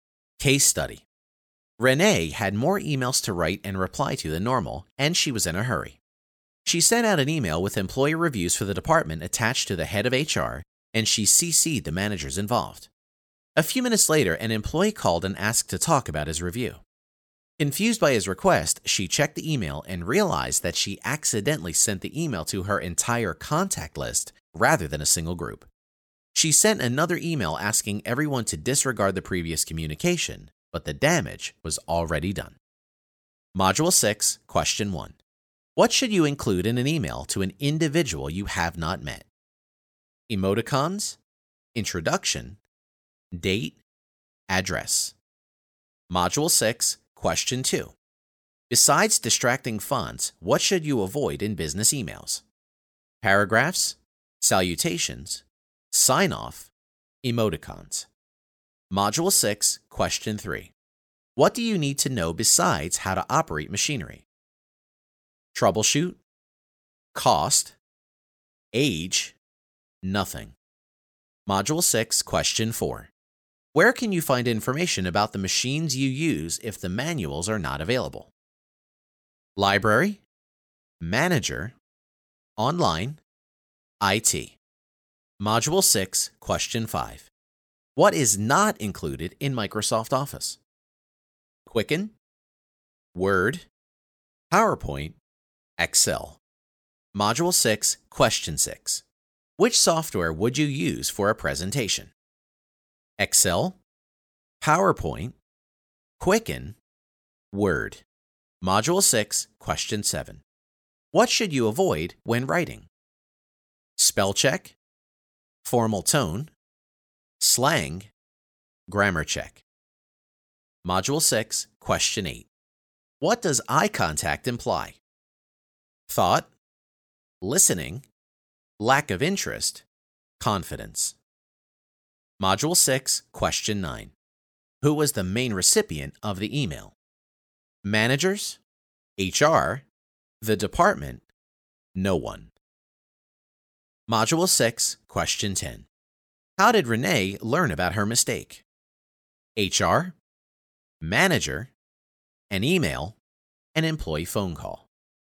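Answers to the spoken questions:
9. HR
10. an employee phone call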